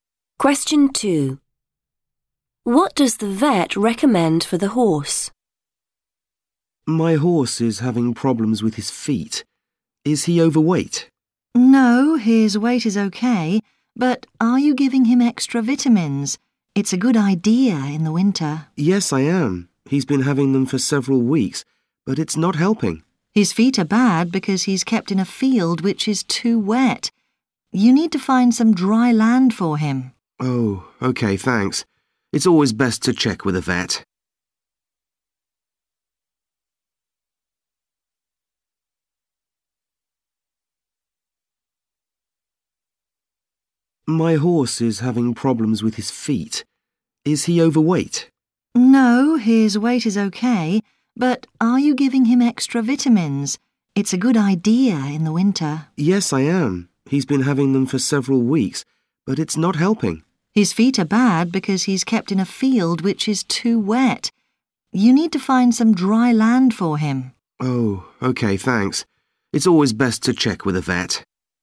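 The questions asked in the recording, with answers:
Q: What does the vet recommend for the horse?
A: Find some dry land for him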